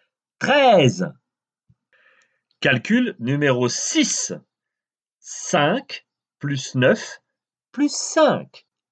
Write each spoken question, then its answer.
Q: 5 plus 9 plus 5.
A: Dix-neuf.